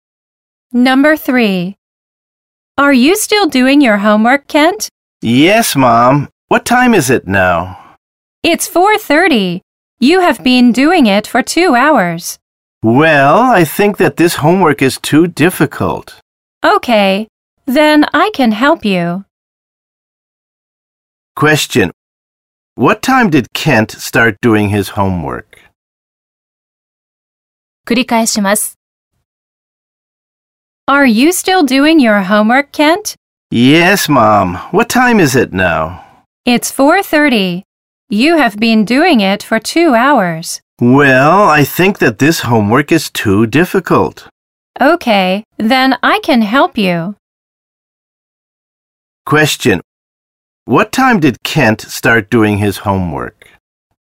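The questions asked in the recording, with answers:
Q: What time did Kent start doing his homework?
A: At 2:30.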